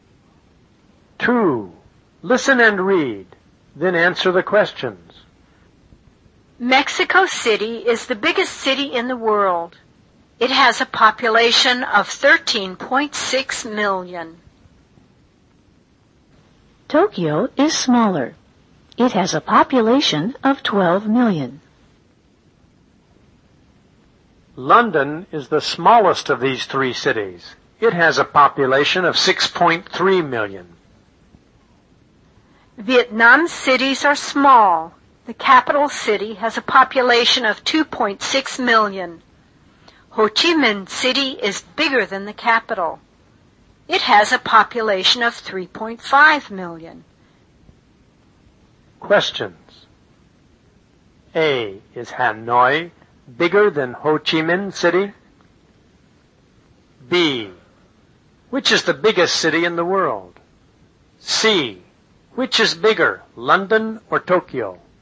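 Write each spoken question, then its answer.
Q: Is Hanoi bigger than Ho Chi Minh City?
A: No, it isn't. Ho Chi Minh City is bigger.

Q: Which is the biggest city in the world?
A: Mexico City

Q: Which is bigger, London or Tokyo?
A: Tokyo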